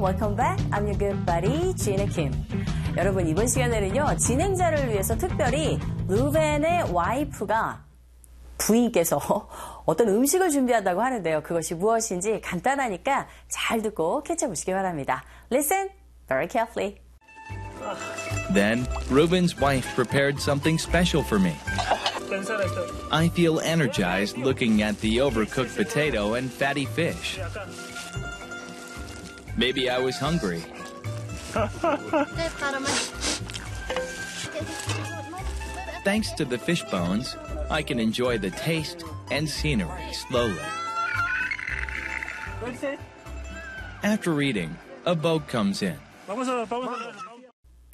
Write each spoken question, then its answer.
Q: 여러분 이번 시간에는요 진행자를 위해서 특별히 루벤의 와이프가 부인께서 어떤 음식을 준비한다고 하는데요. 그것이 무엇인지 간단하니까 잘 듣고 캐쳐보시기 바랍니다.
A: 감자와 생선이었네요.